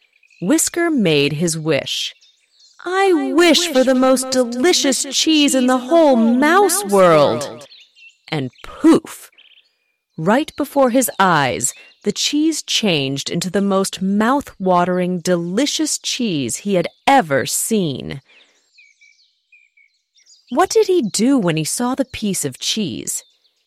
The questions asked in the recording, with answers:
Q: What did he do when he saw the piece of cheese?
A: He made his wish.